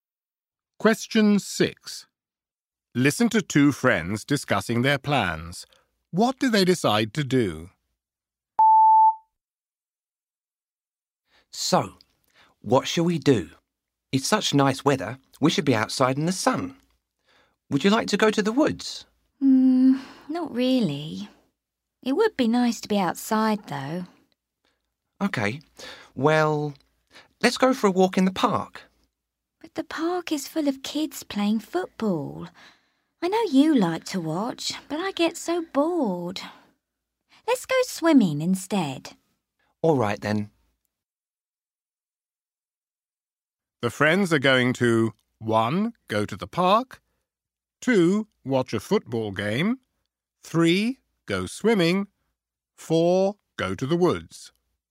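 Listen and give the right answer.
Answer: 3: Go swimming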